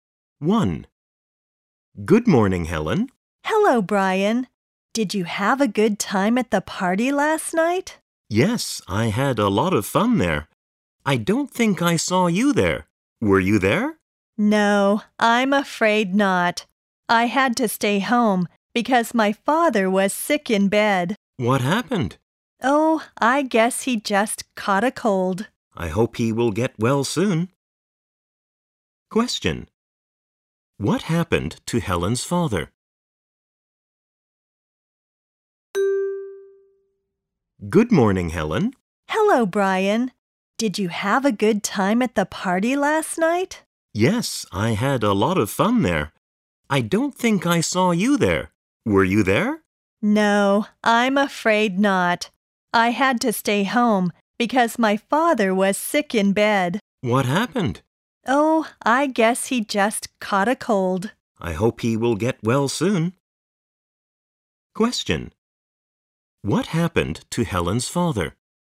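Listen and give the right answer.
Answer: He caught a cold and was sick in bed.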